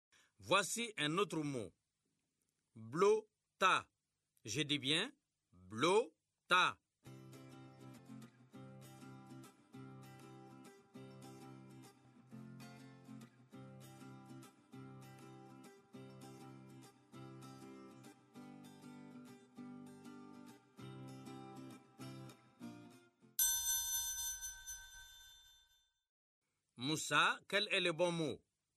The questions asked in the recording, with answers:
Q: Moussa, quel est le bon mot?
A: Tableau, monsieur.